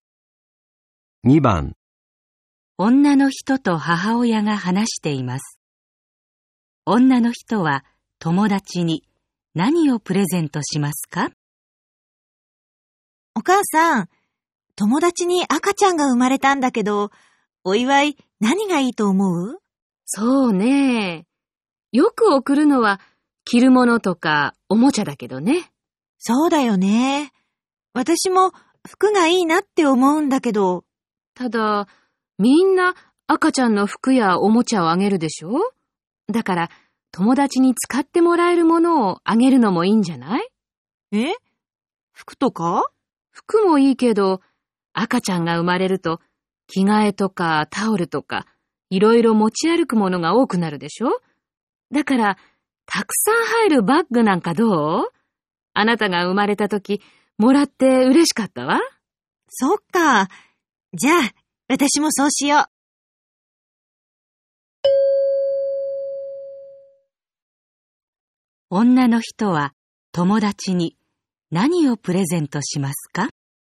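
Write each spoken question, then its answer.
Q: 女の人は友達に何をプレゼントしますか?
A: たくさん入るバッグ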